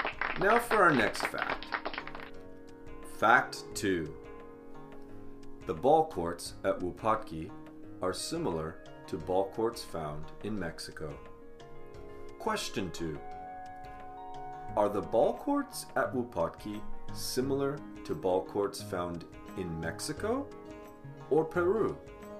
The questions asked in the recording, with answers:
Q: Are the ball courts at Wupatki similar to ball courts found in Mexico or Peru?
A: The ball courts found in Wupatki are similar to ball courts found in Mexico.